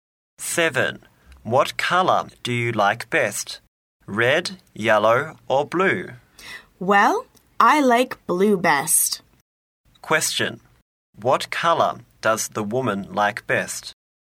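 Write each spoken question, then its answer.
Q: What color does the woman like best?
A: Blue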